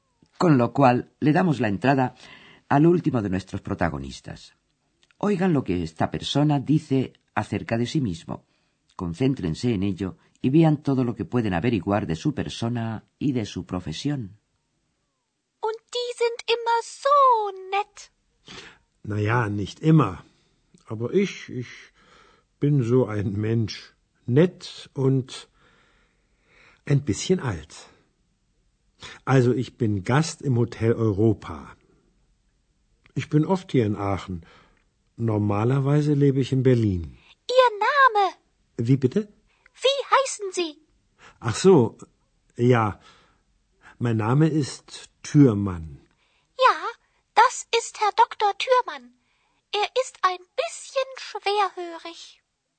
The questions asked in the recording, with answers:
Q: Concéntrense en ello y vean todo lo que pueden averiguar de su persona y de su profesión.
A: Lo primero que dice es que es huésped del Hotel Europa.